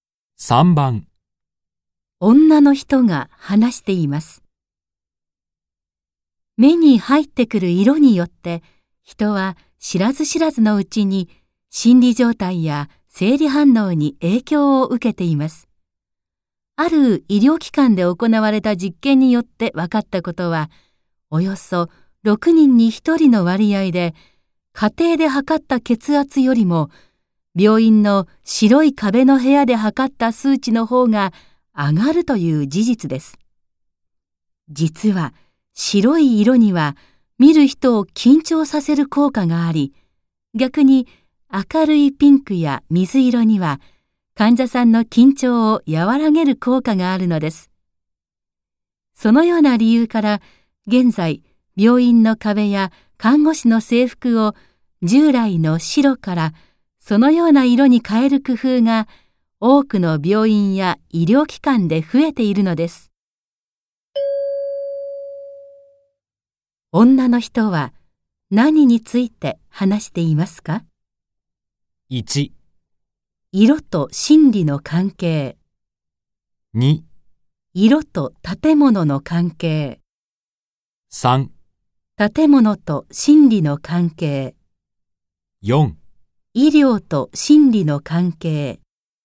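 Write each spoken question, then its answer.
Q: 女の人は何について話していますか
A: 1: 色と心理の関係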